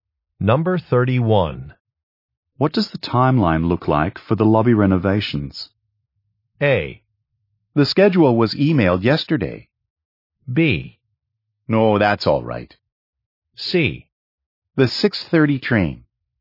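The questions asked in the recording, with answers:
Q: What does the timeline look like for the lobby renovations?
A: A: The schedule was emailed yesterday.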